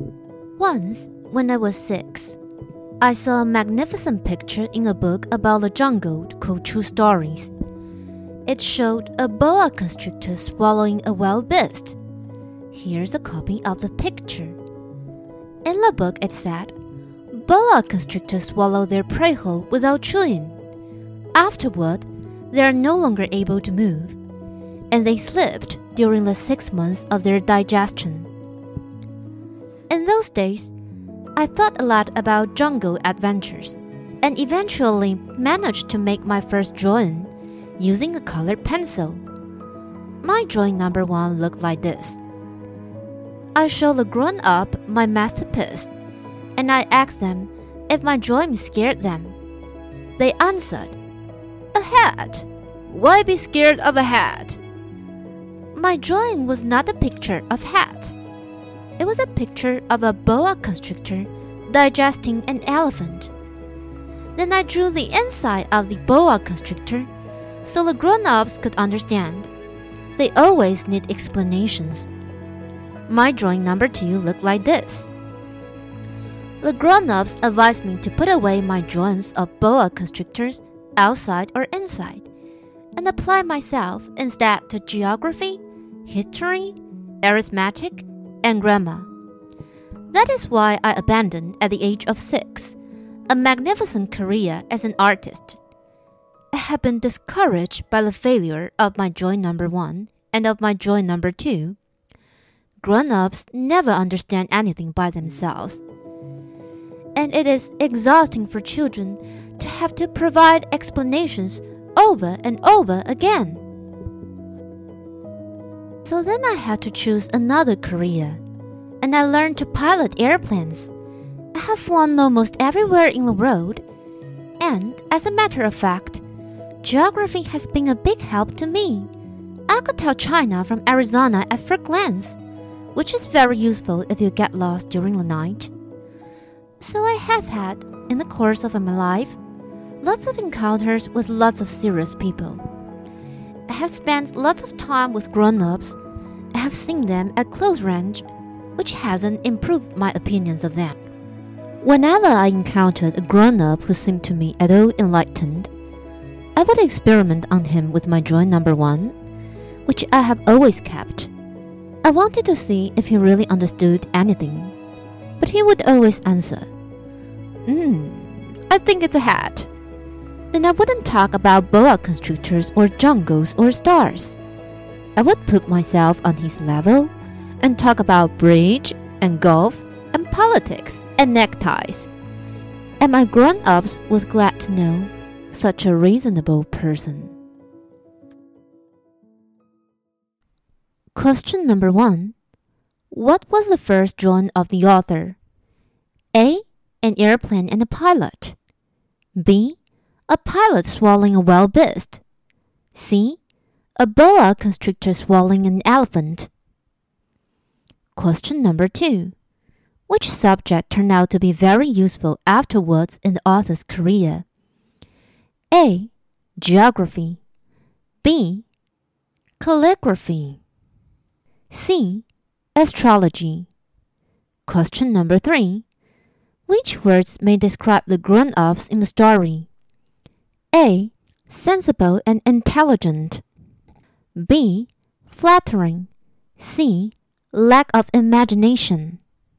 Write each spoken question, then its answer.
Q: What was the first drawing of the author?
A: The correct answer is C. A boa constrictor swallowing an elephant.

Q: Which subject turned out to be very useful afterwards in the author's career?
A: 所以答案就是 A geography 地理

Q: Which words may describe the grown-ups in the story?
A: 这题的答案就是 C。Lack of imagination